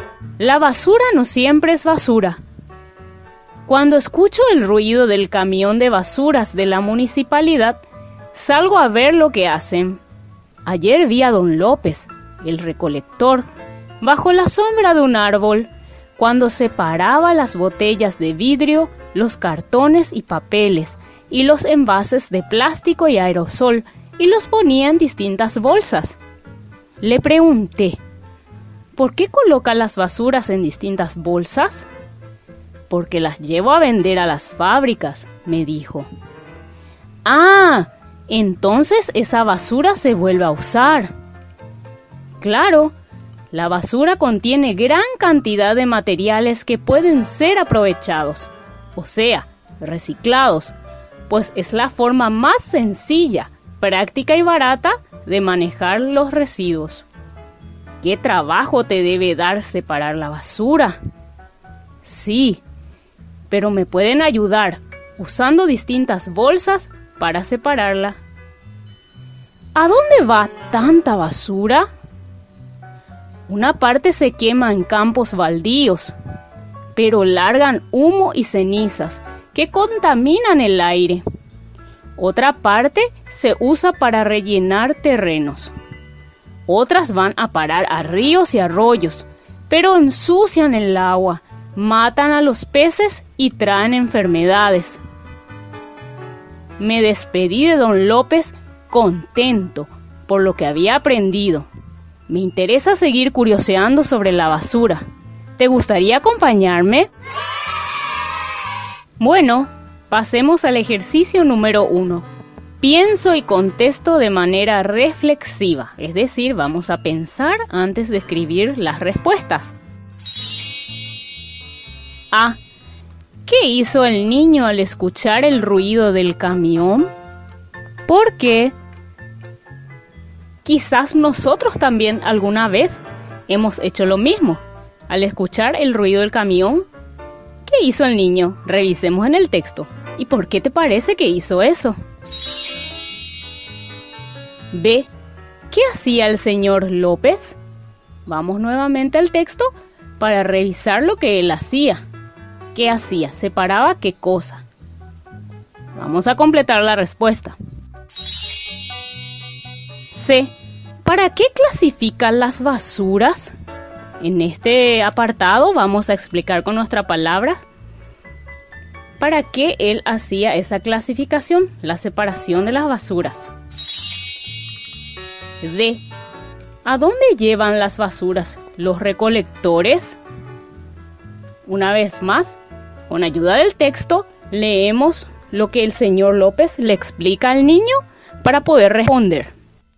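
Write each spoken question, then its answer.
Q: ¿Qué hizo el niño al escuchar el ruido del camión?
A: Salió a ver lo que hacían

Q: ¿Qué hacía el señor López?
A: Separaba las botellas de vidrio, los cartones y papeles, y los envases de plástico y aerosol en distintas bolsas

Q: ¿Para qué clasifica las basuras?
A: Para llevarlas a vender a las fábricas, donde se reciclan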